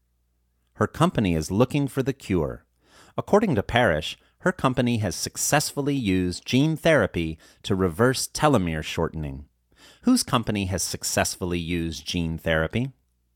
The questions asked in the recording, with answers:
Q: Whose company has successfully used gene therapy?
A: Parrish's company has successfully used gene therapy.